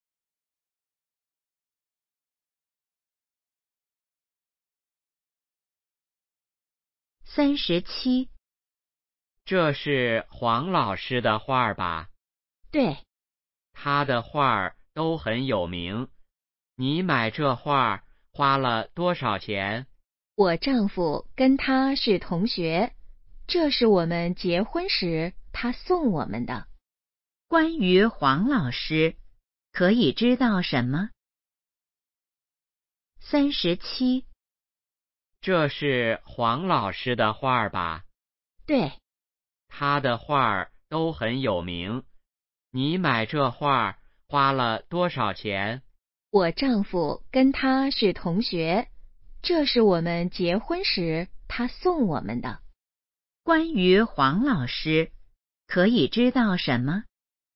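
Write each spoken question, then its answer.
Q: 关于黄老师,可以知道什么?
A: 他的画很有名,是女的丈夫的同学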